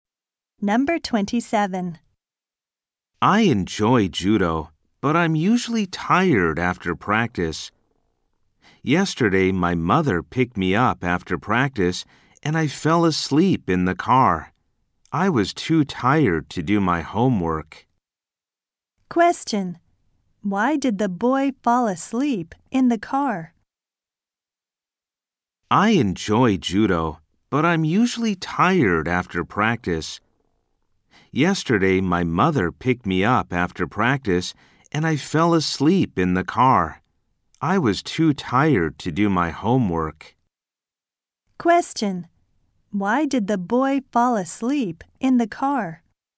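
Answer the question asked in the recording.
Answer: He was tired after judo practice.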